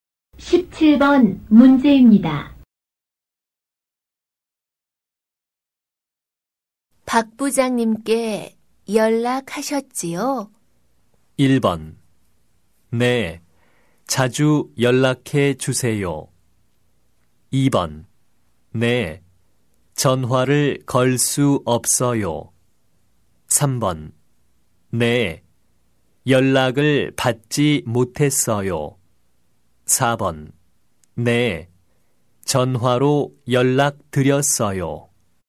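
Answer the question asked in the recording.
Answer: 4: 네, 전화로 연락 드렸어요.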